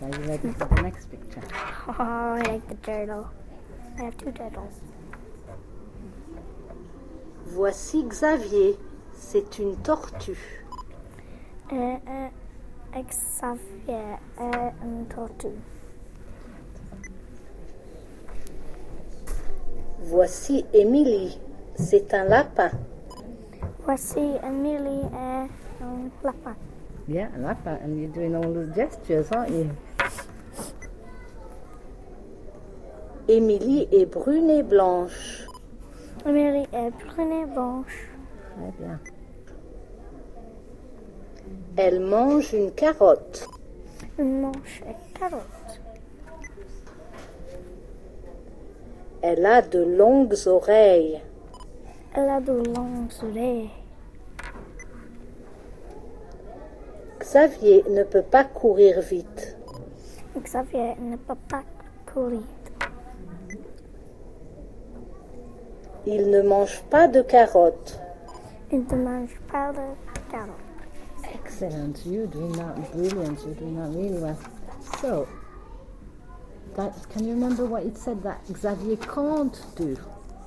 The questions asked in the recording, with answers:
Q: So, can you remember what it said that Xavier can't do?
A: Can't run very fast.